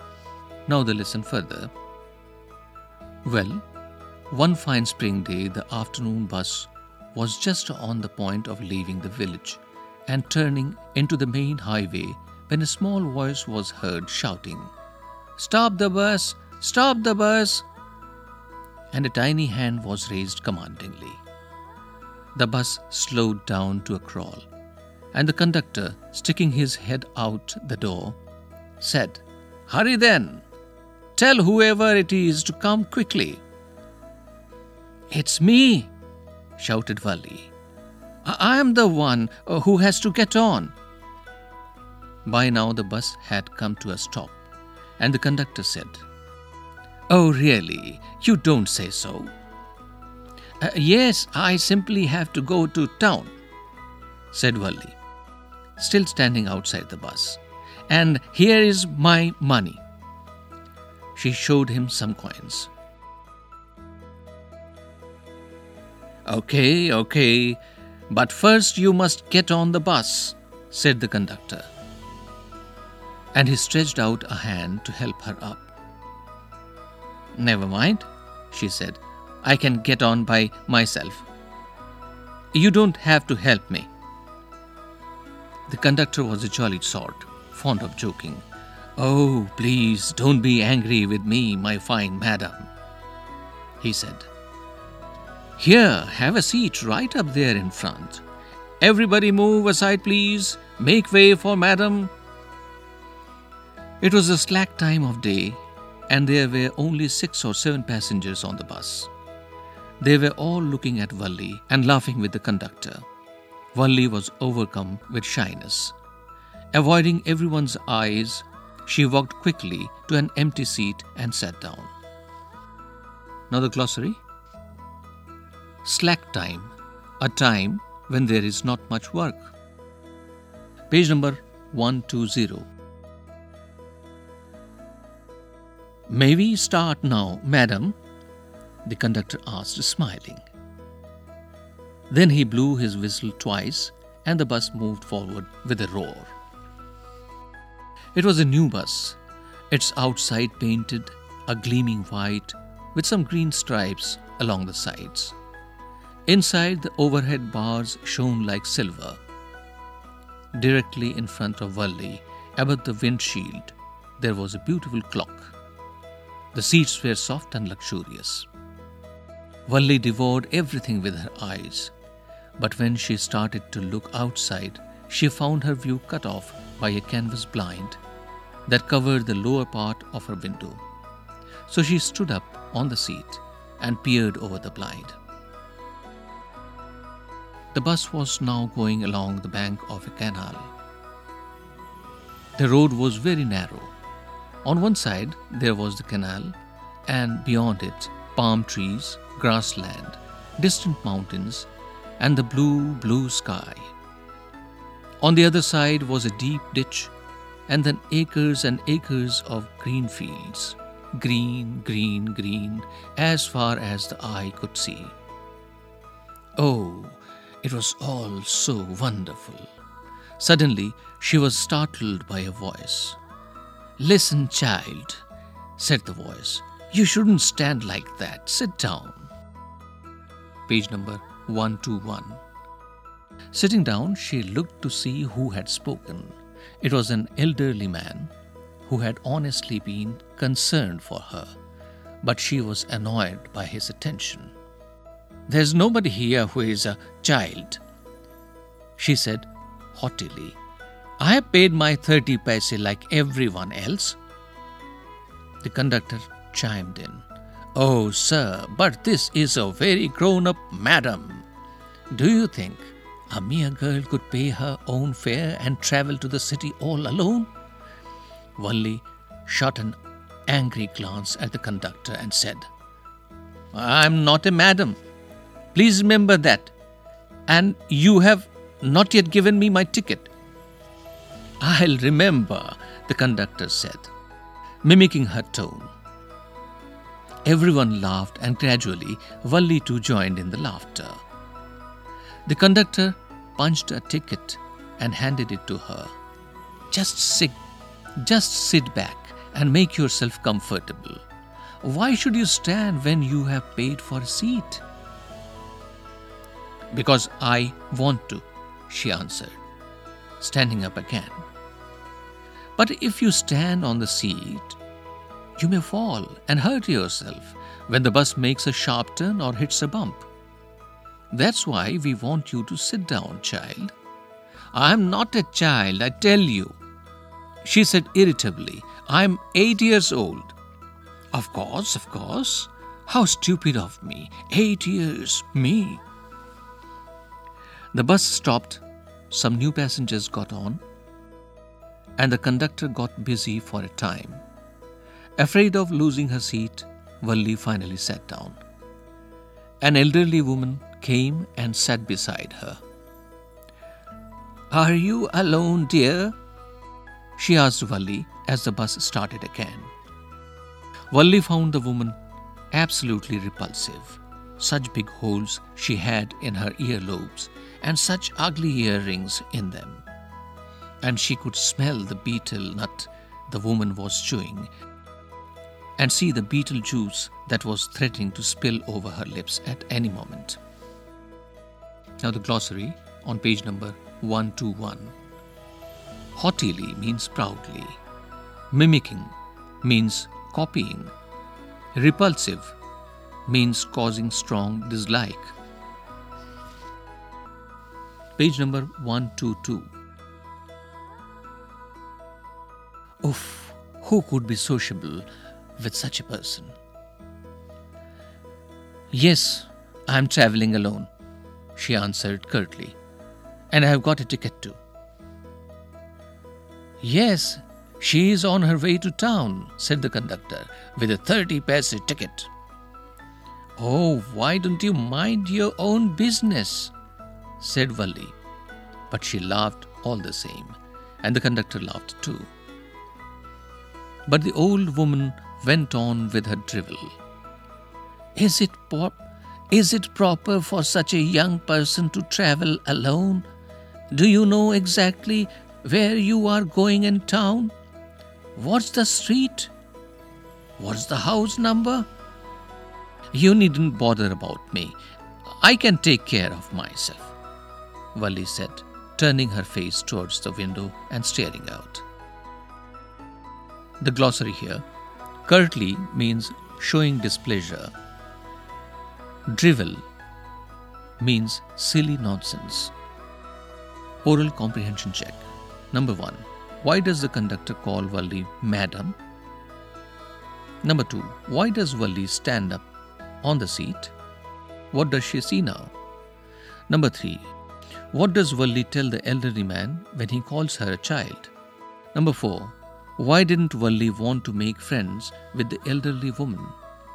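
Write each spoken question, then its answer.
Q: Why does the conductor call Valli madam?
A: As a joke, because she acted like a grown-up lady, paying her own fare and travelling alone

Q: Why does Valli stand up on the seat?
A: A canvas blind blocked her view out of the window

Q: What does she see now?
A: The canal, palm trees, grassland, distant mountains, the blue sky and green fields

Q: What does Valli tell the elderly man when he calls her a child?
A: That nobody there is a child, and that she has paid her 30 paise like everyone else

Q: Why didn't Valli want to make friends with the elderly woman?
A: She found her repulsive because of the big holes in her earlobes, her ugly earrings and the betel nut she was chewing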